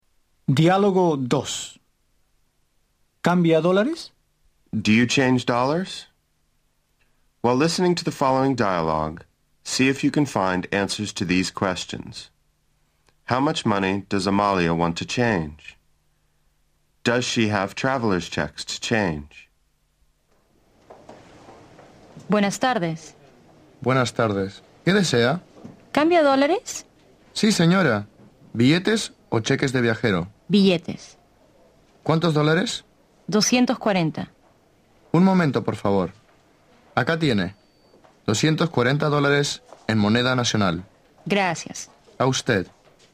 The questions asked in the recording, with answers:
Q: How much money does Amalia want to change?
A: Amalia wants to change $240.

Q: Does she have traveler's checks to change?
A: She doesn't have traveler's checks.